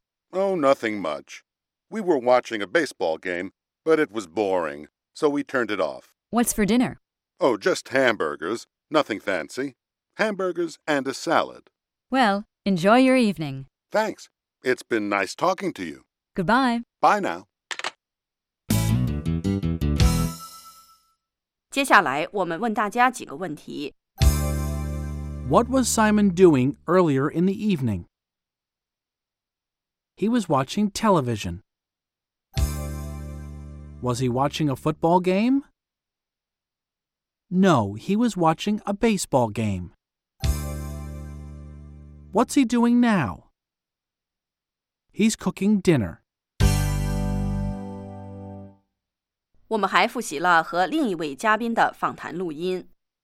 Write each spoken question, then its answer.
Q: What was Simon doing earlier in the evening?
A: He was watching television.